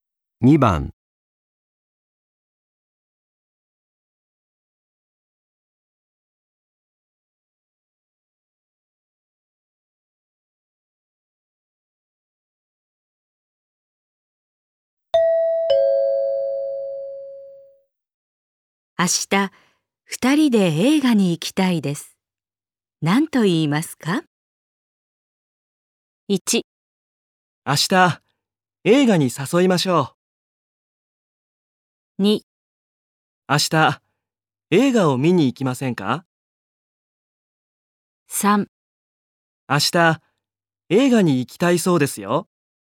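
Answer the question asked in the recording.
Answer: 2: 明日、映画を見に行きませんか?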